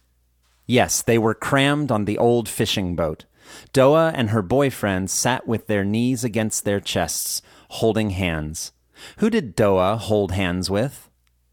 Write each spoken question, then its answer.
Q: Who did Doa hold hands with?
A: Doa held hands with her boyfriend.